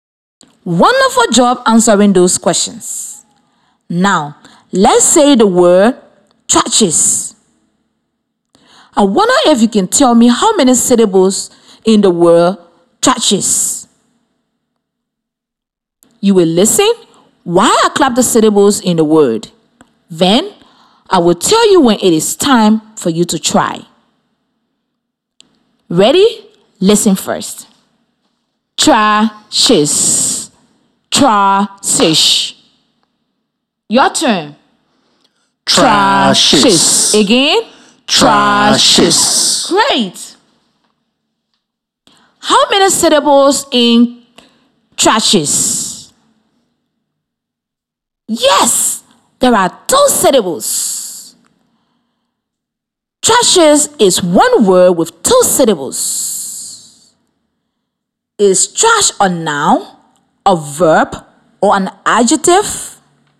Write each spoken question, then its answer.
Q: How many syllables in thrashes?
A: Yes, there are 2 syllables.